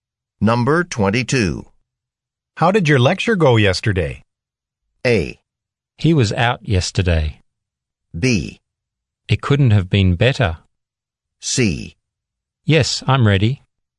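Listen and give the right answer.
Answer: B: It couldn't have been better.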